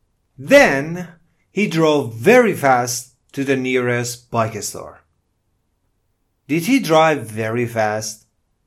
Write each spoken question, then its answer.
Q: Did he drive very fast?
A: Yes, he drove very fast.